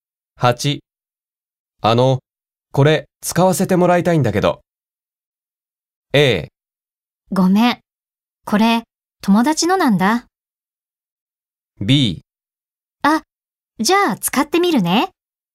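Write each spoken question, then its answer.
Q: これ使わせてもらいたいんだけど。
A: A: ごめん、これ友達のなんだ。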